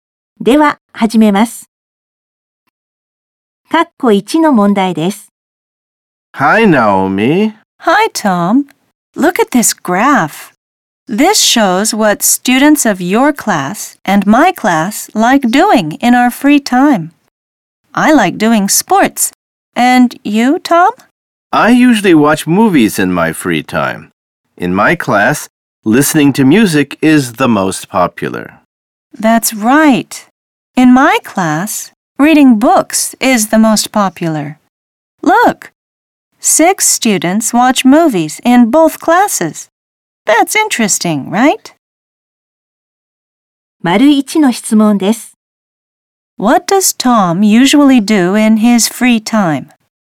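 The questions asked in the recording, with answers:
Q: What does Tom usually do in his free time?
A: He watches movies.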